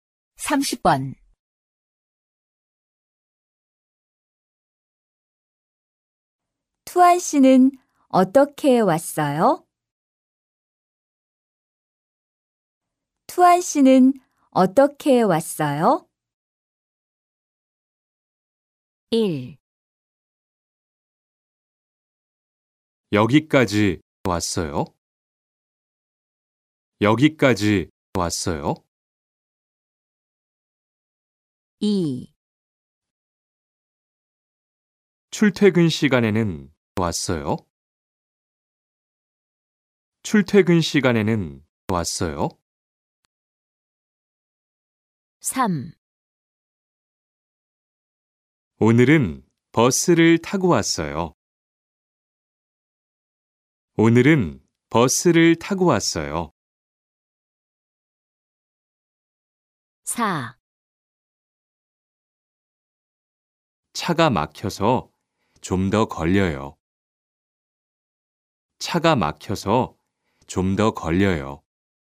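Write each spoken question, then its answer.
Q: 투안 씨는 어떻게 왔어요?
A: 3: 오늘은 버스를 타고 왔어요.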